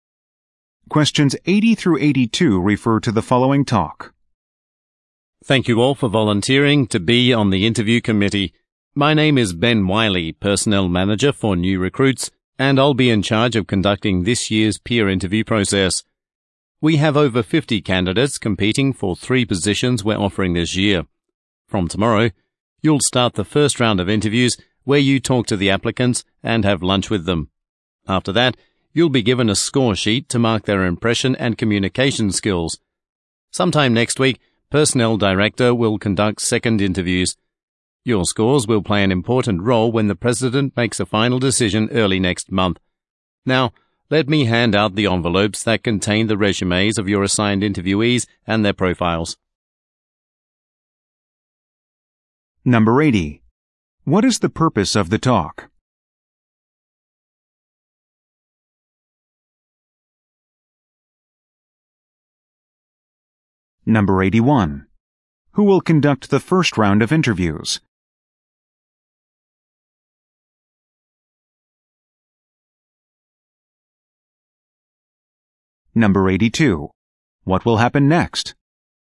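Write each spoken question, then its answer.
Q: What is the purpose of the talk?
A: To explain the peer interview process to the volunteers

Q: Who will conduct the first round of interviews?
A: The volunteers on the interview committee

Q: What will happen next?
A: Envelopes with the candidates' resumes will be handed out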